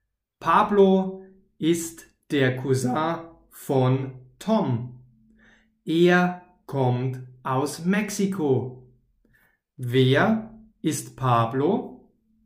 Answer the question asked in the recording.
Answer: Der Cousin von Tom. Pablo ist der Cousin von Tom.